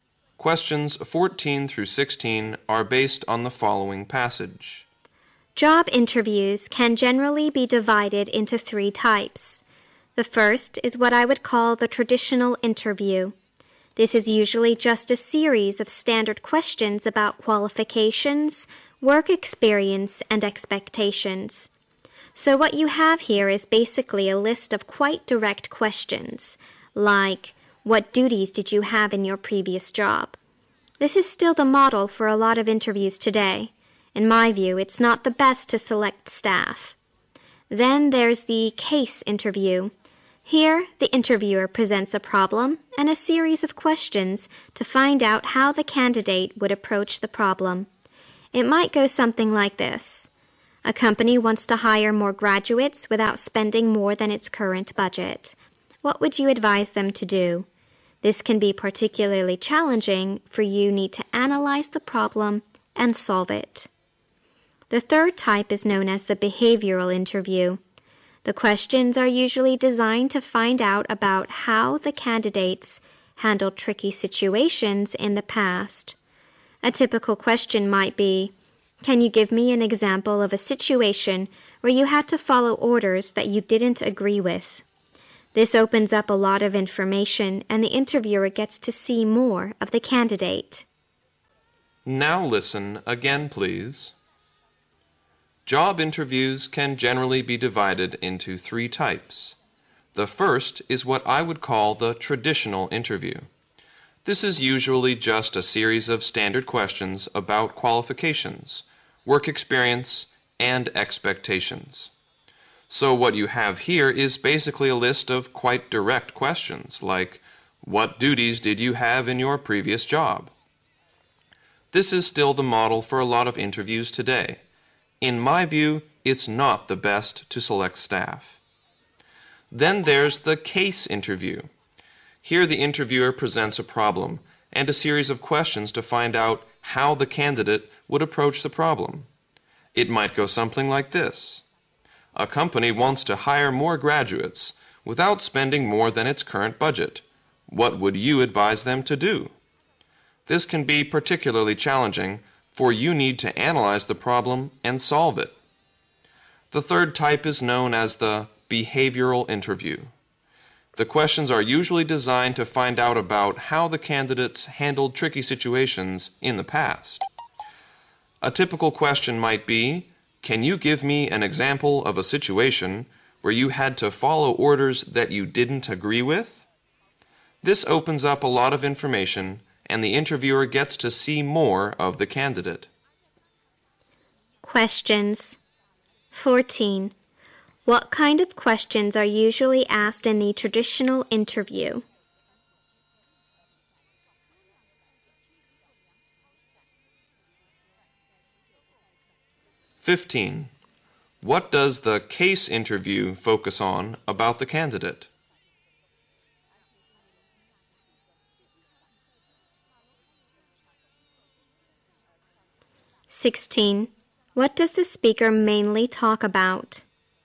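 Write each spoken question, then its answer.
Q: What kind of questions are usually asked in the traditional interview?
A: Standard, direct questions about qualifications, work experience and expectations.

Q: What does the case interview focus on about the candidate?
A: How the candidate approaches, analyzes and solves a problem.

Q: What does the speaker mainly talk about?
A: Three types of job interviews.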